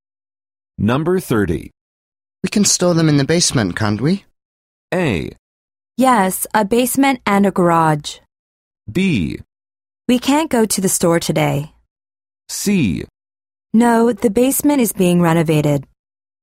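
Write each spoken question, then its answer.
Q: We can store them in the basement, can't we?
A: C: No, the basement is being renovated.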